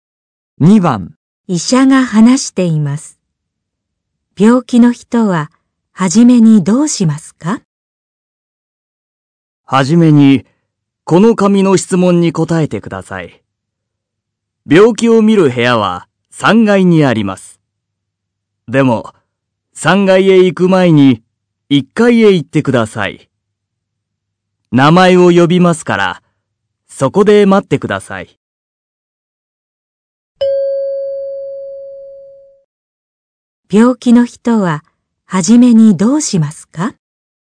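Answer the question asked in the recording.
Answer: 紙の質問に答える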